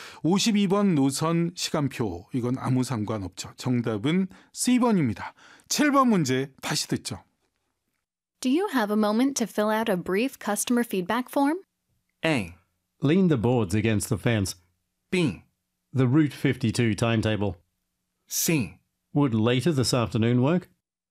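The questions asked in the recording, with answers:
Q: Do you have a moment to fill out a brief customer feedback form?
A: C: Would later this afternoon work?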